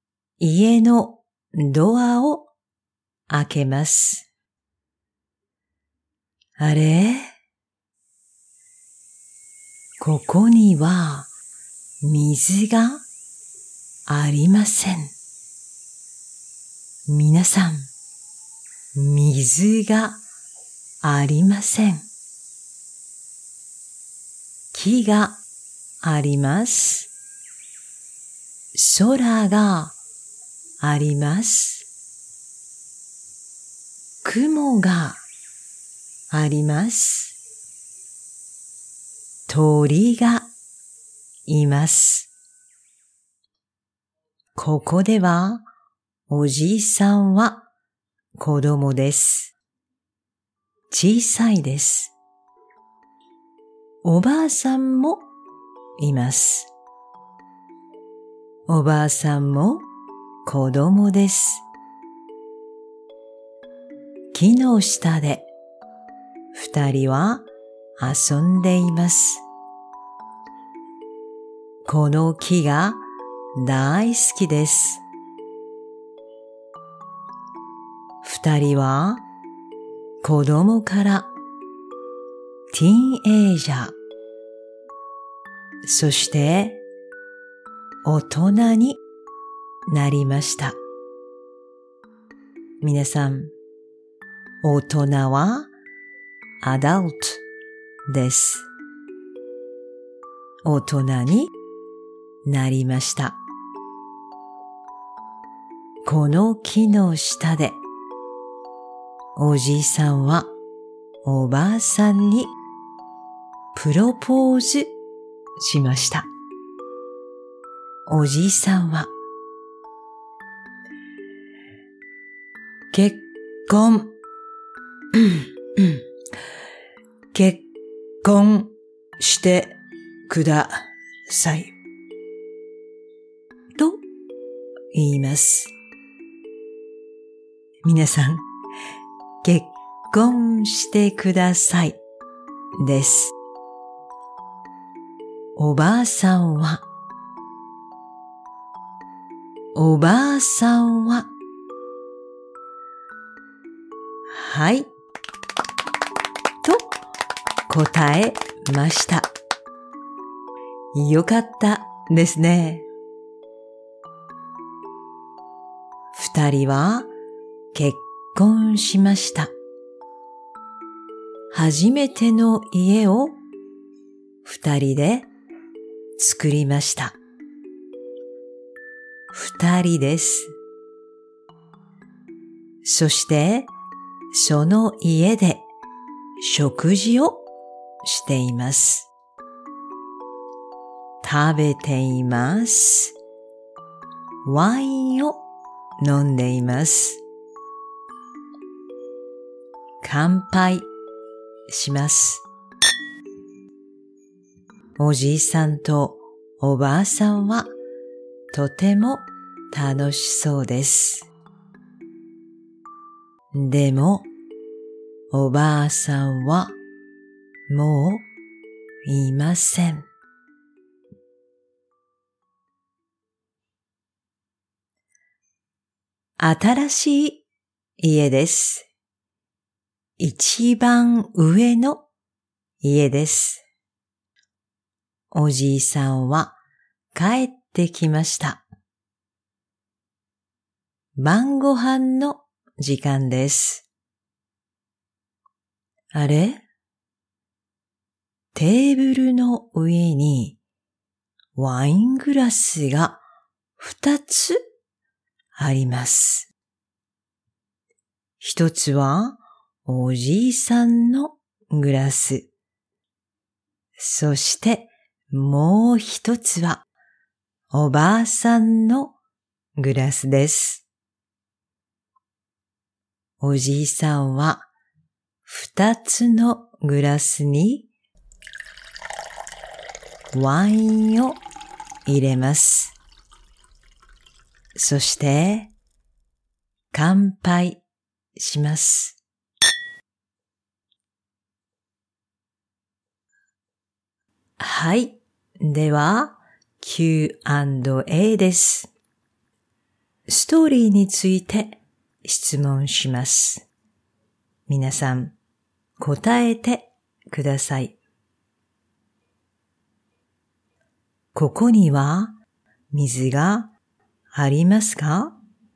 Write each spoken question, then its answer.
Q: ここには水がありますか?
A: いいえ、ありません。水がありません。